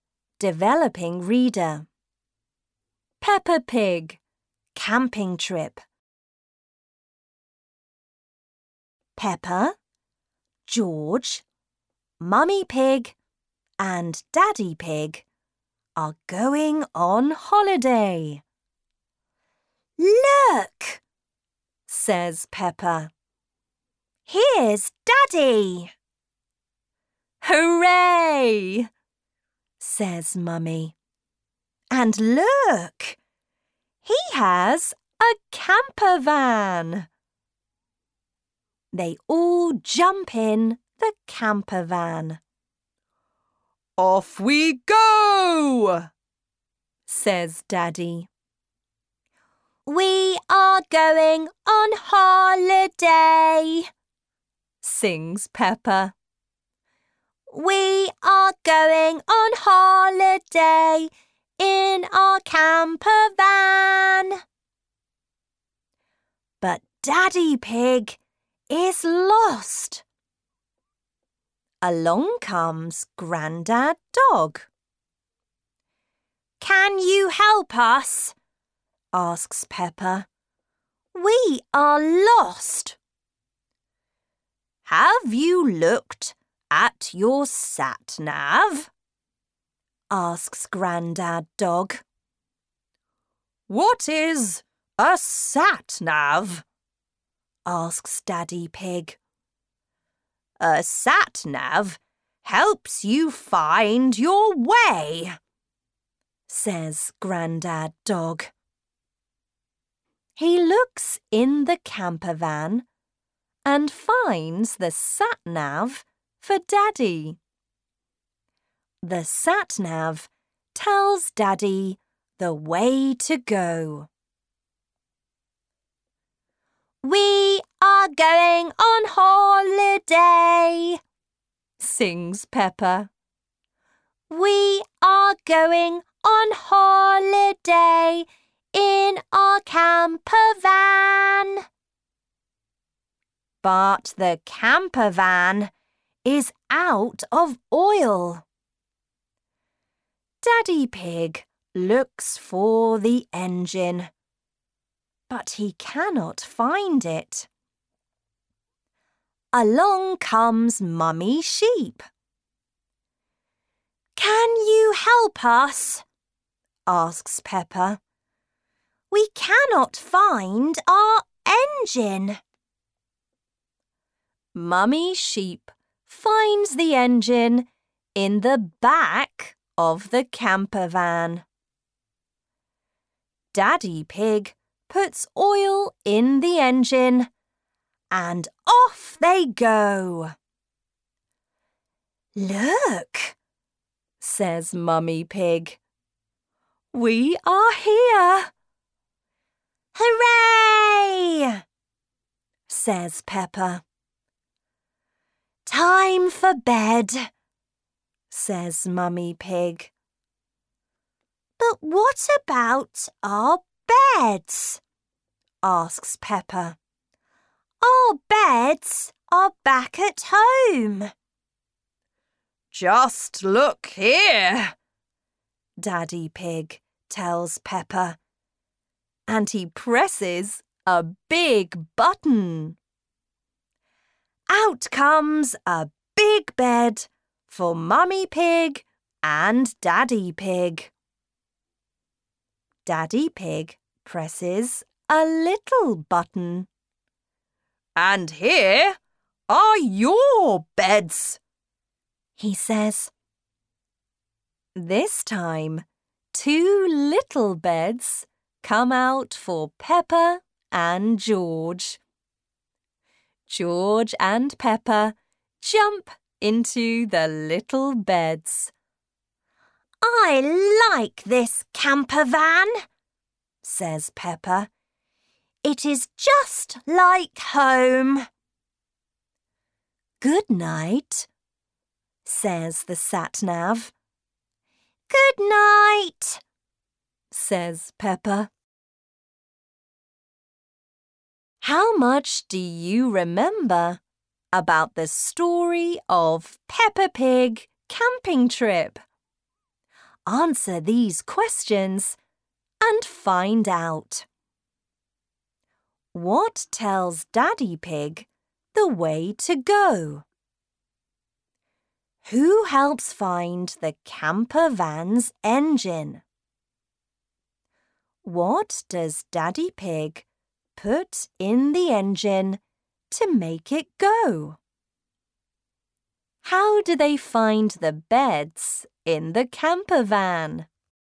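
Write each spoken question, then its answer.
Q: What tells Daddy Pig the way to go?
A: The sat-nav

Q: Who helps find the camper van's engine?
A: Mummy Sheep

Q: What does Daddy Pig put in the engine to make it go?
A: Oil

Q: How do they find the beds in the camper van?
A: Daddy Pig presses buttons and the beds come out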